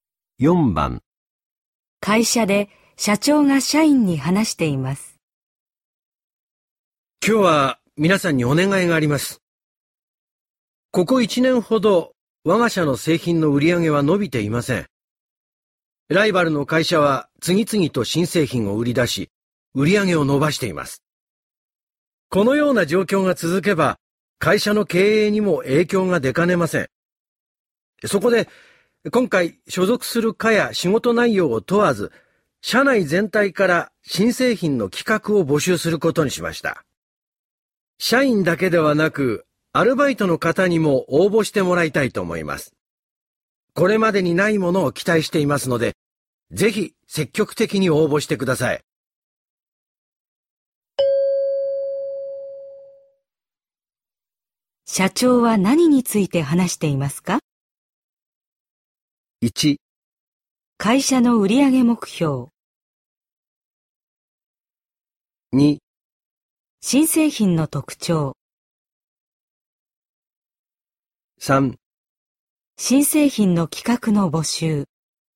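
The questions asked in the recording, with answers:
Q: 社長は何について話していますか?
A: 3: 新製品の企画の募集。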